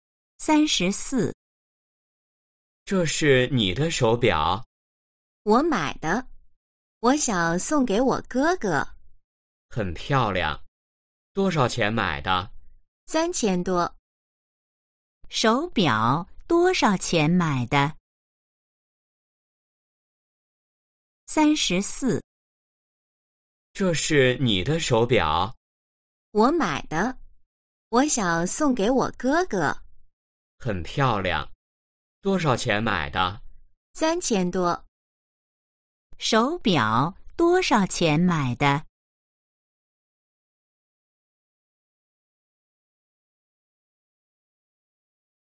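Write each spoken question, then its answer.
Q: 手表多少钱买的?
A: 3000多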